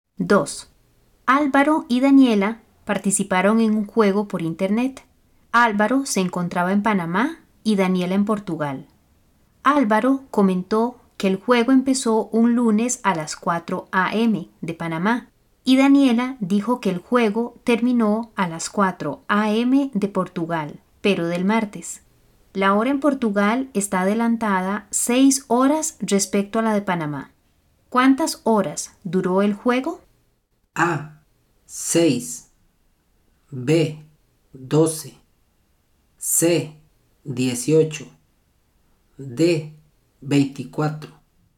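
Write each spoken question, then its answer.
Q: ¿Cuántas horas duró el juego?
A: C: 18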